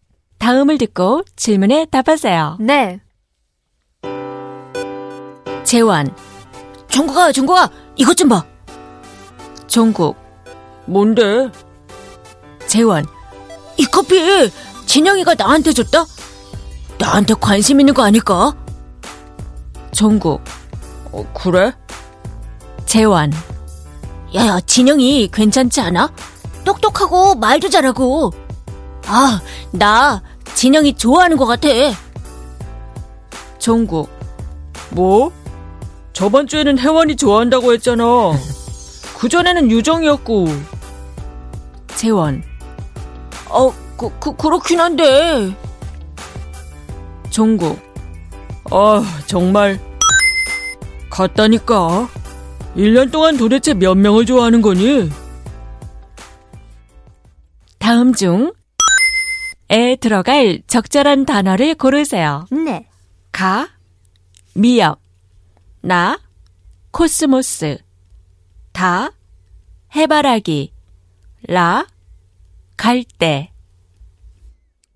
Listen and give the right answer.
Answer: The answer is la.